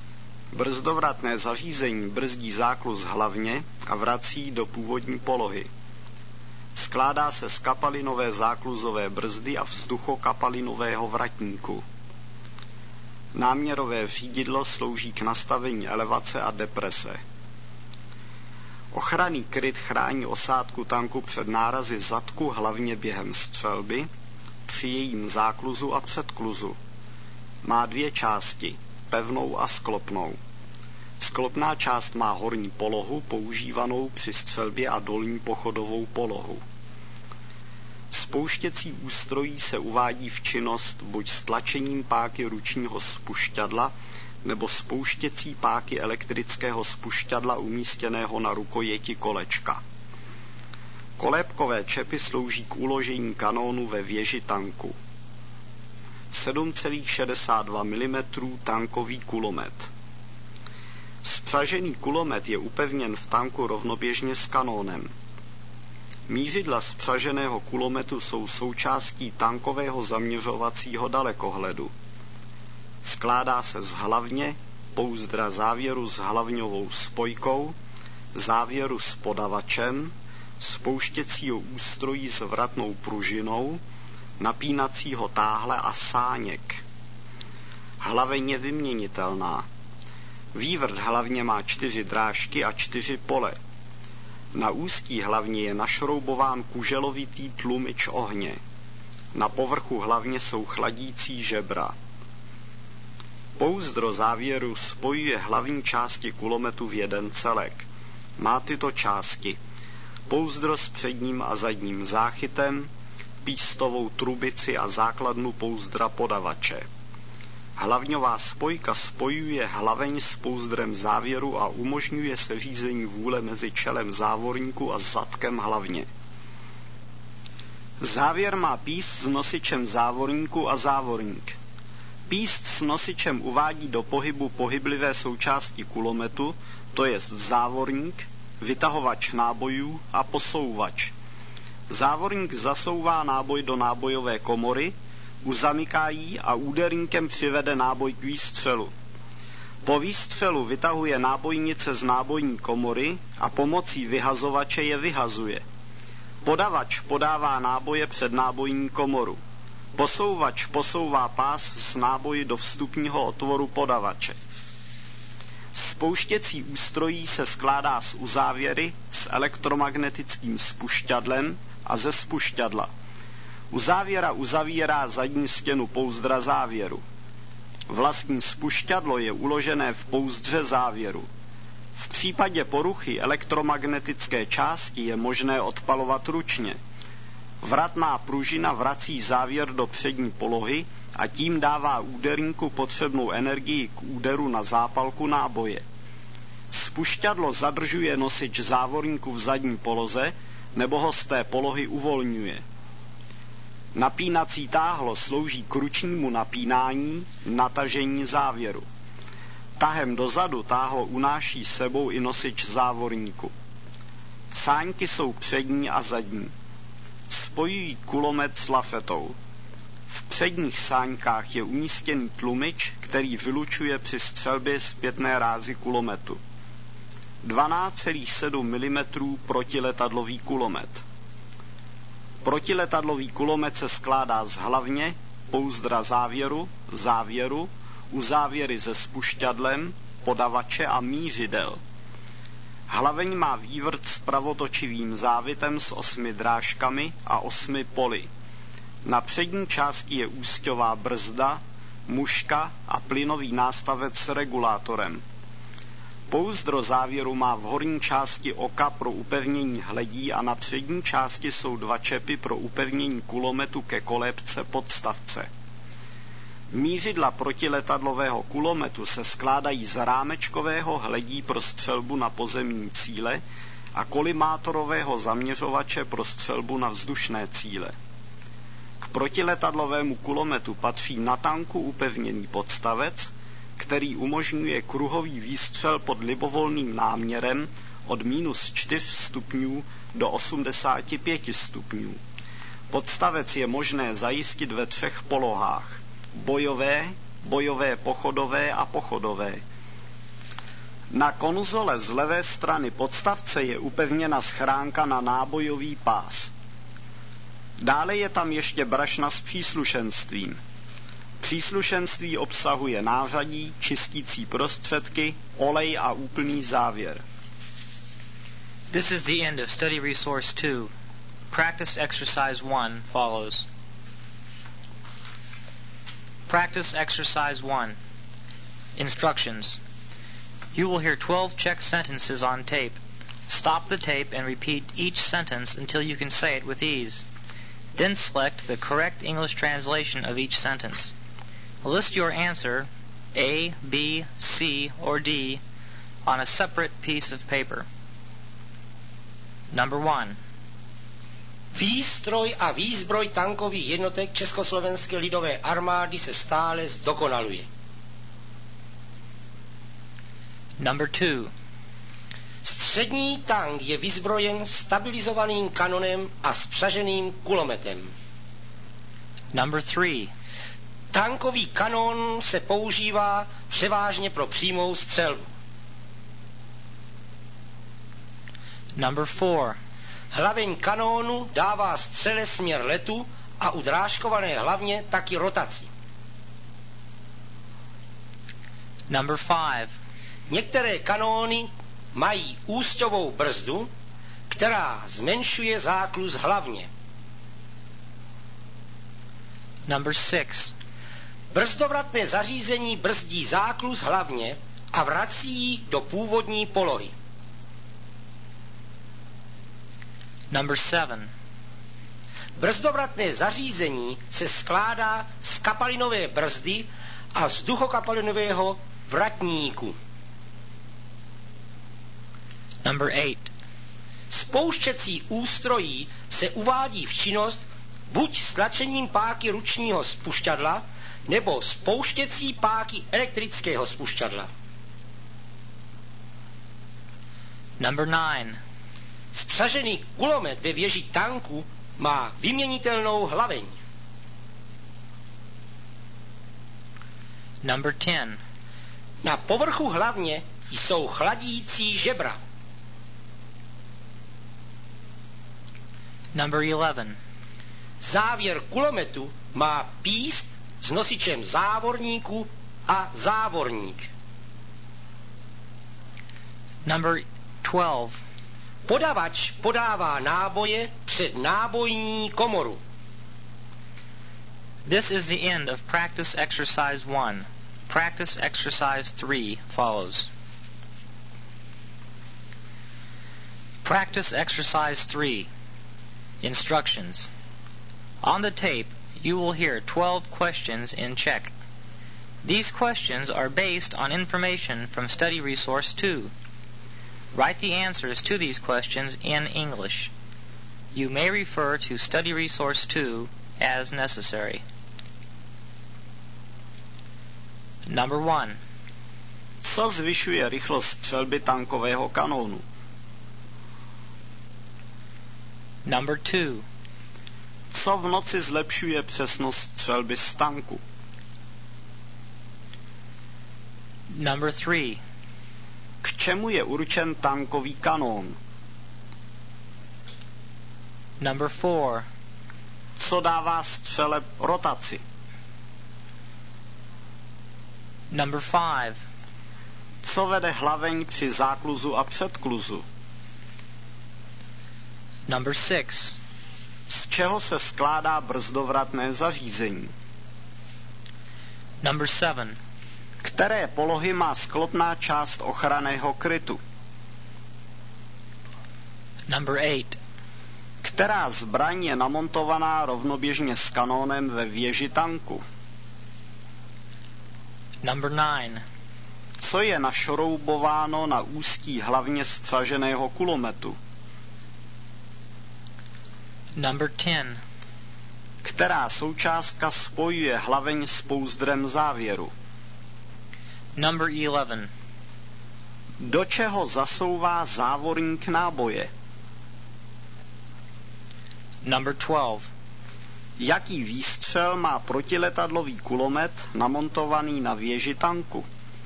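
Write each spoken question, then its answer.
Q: Z čeho se skládá brzdovratné zařízení?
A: Z kapalinové zákluzové brzdy a vzduchokapalinového vratníku

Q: Které polohy má sklopná část ochranného krytu?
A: Horní polohu pro střelbu a dolní pochodovou polohu

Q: Která zbraň je namontovaná rovnoběžně s kanónem ve věži tanku?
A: Spřažený tankový kulomet ráže 7,62 mm

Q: Co je našroubováno na úzký hlavně zpřaženého kulometu?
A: Kuželovitý tlumič ohně

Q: Která součástka spojuje hlaveň s pouzdrem závěru?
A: Hlavňová spojka

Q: Do čeho zasouvá závorník náboje?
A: Do nábojové (nábojní) komory

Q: Jaký výstřel má protiletadlový kulomet namontovaný na věži tanku?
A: Kruhový výstřel pod náměrem od −4 do 85 stupňů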